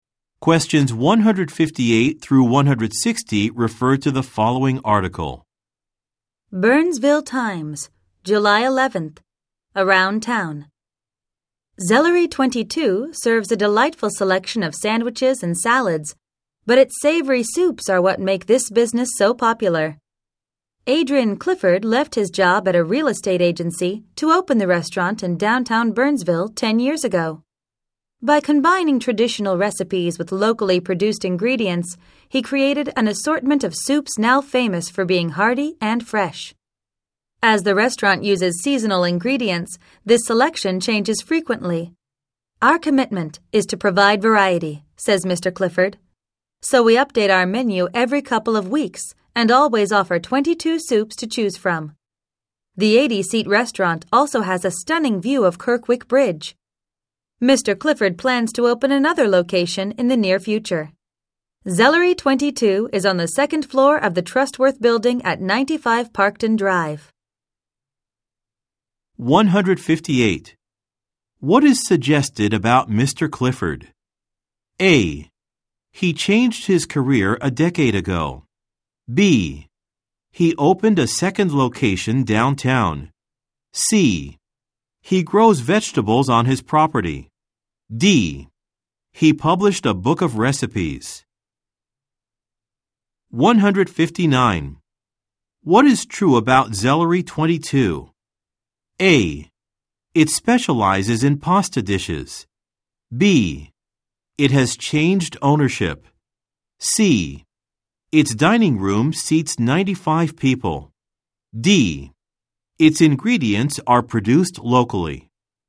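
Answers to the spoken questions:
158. A: He changed his career a decade ago.
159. D: Its ingredients are produced locally.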